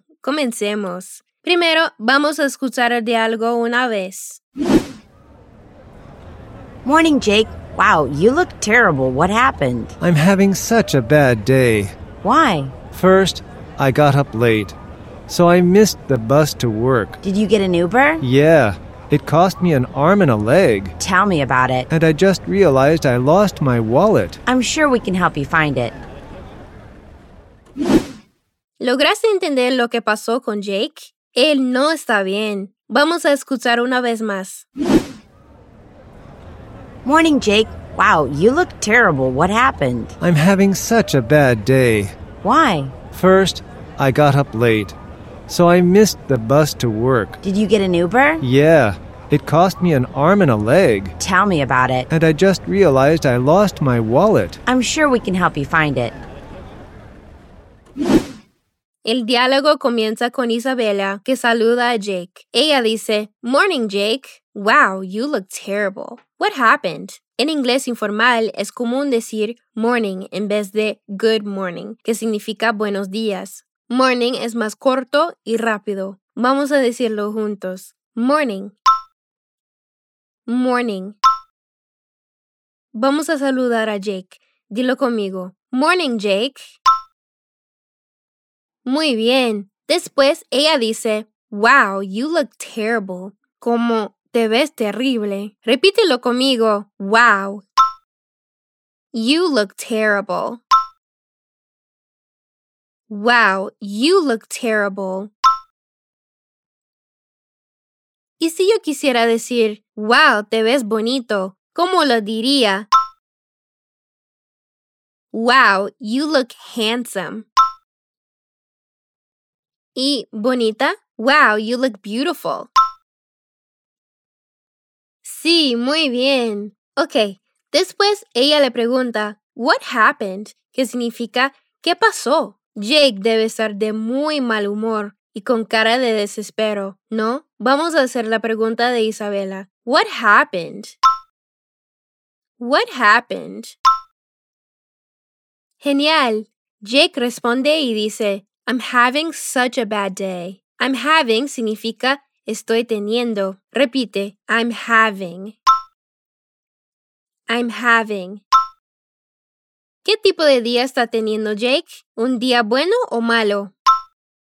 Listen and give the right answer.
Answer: Sí, un día tan malo. Such a bad day.